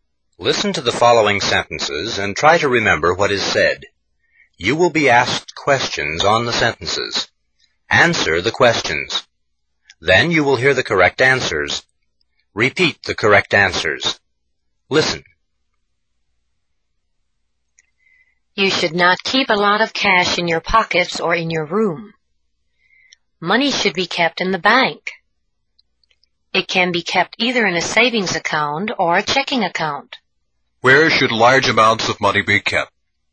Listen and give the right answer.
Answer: In the bank. It should be kept in the bank.